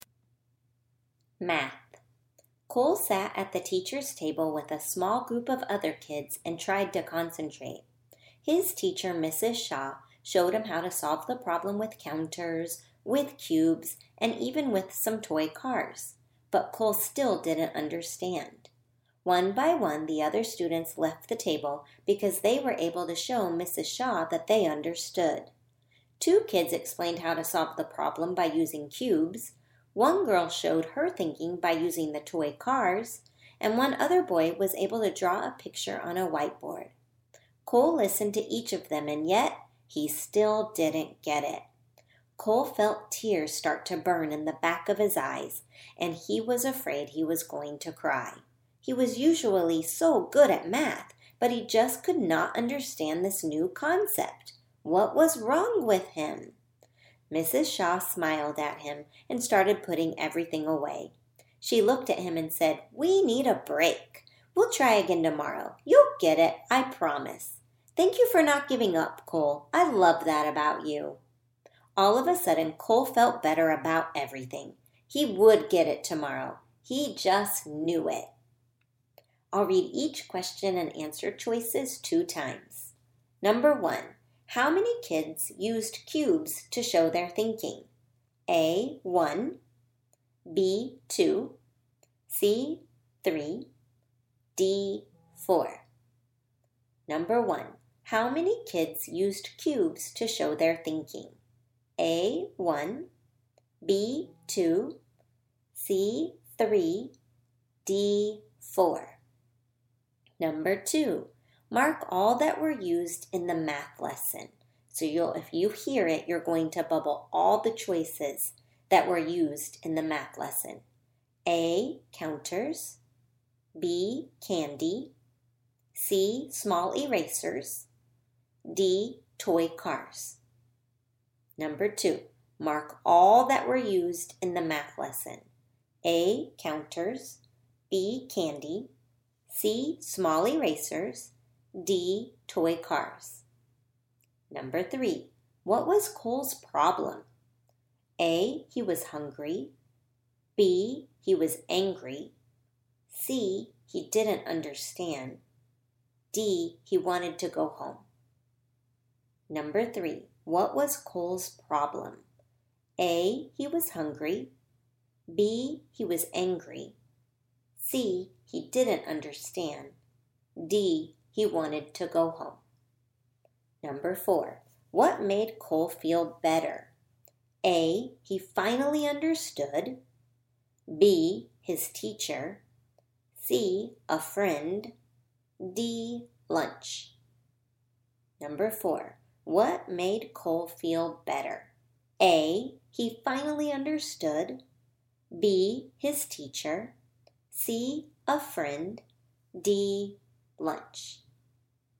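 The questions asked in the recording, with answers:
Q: How many kids used cubes to show their thinking?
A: B: 2

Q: Mark all that were used in the math lesson.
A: A: counters; D: toy cars

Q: What was Cole's problem?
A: C: he didn't understand

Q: What made Cole feel better?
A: B: his teacher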